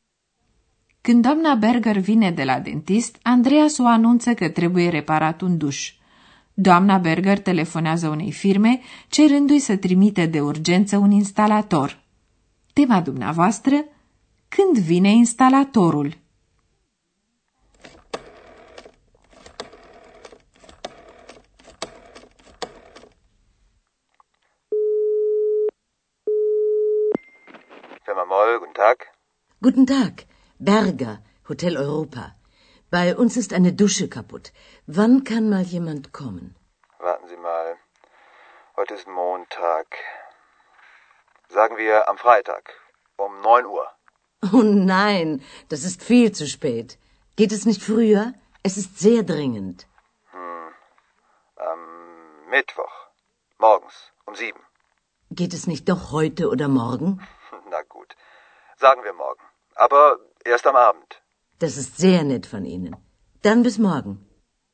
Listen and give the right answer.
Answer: Doamna Berger a reușit să obțină un instalator pentru seara următoare.